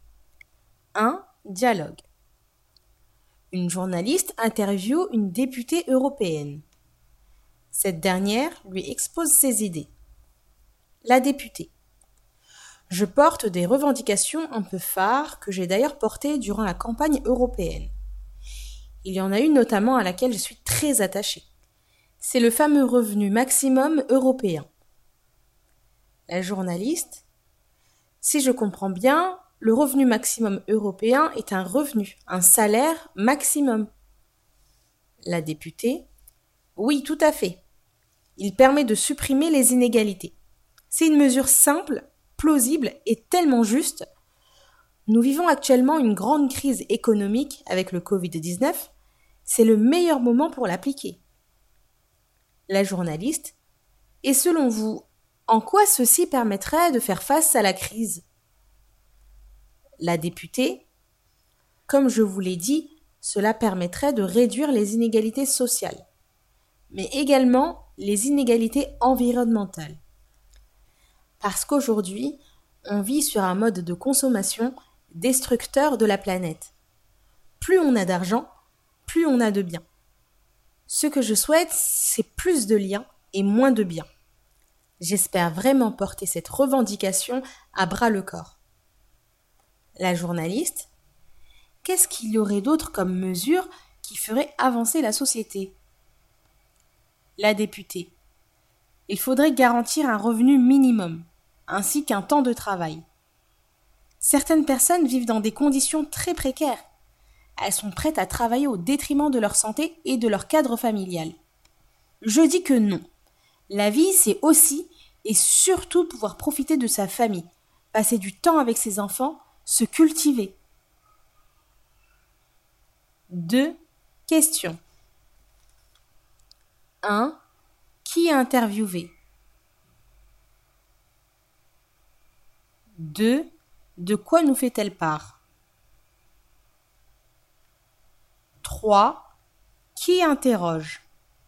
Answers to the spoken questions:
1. Une députée.
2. Elle nous expose ses idées.
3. Une journaliste.